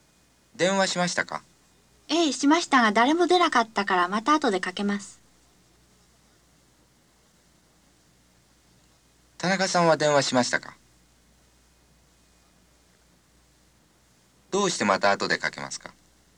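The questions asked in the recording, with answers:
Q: 田中さんは電話しましたか?どうしてまた後でかけますか?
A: はい、しました。誰も出なかったから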